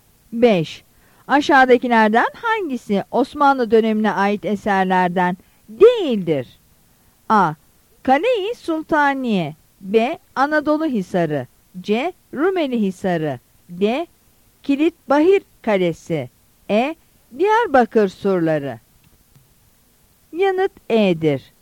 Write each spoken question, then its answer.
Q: Aşağıdakilerden hangisi Osmanlı dönemine ait eserlerden değildir?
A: Yanıt E'dir.